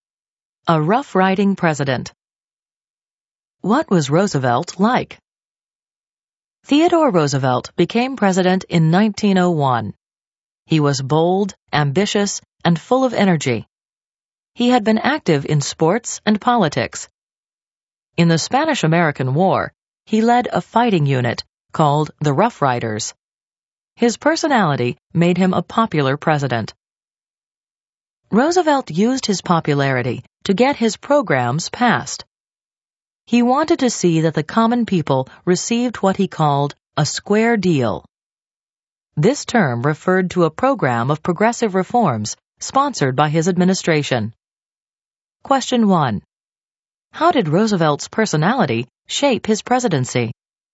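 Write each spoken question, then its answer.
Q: How did Roosevelt's personality shape his presidency?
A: His bold, energetic personality made him popular, and he used that popularity to get his programs (the Square Deal) passed.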